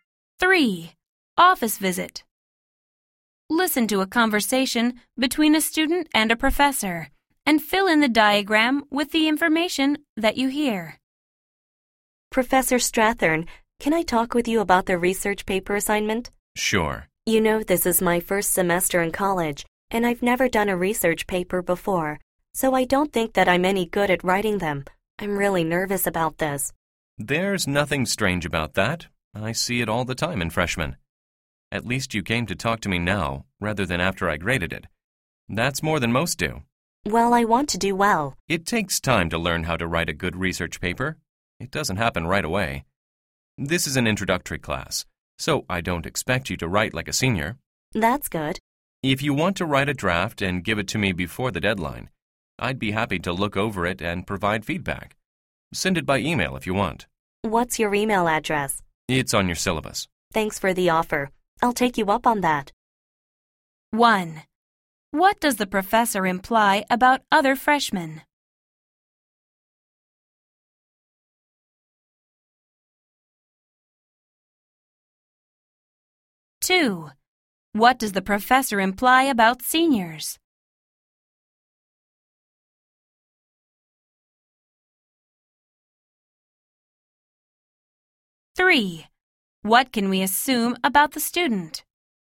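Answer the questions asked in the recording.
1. Many are nervous about research papers, but most don't come to talk to the professor before the paper is graded.
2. Seniors write better research papers than students in introductory classes.
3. The student will write a draft and email it to the professor for feedback.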